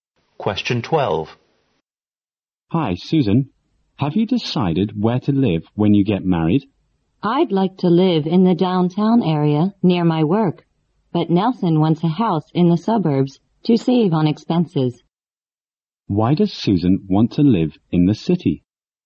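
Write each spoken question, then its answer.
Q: Why does Susan want to live in the city?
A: It is near her work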